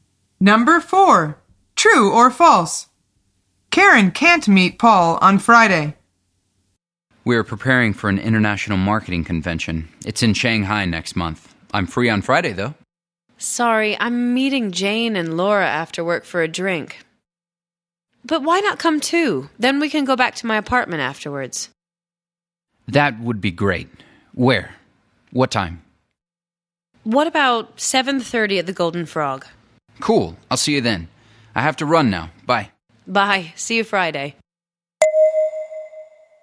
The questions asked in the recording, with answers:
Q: True or false? Karen can't meet Paul on Friday.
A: The answer is false. Karen is meeting friends on Friday, but she says, why not come too?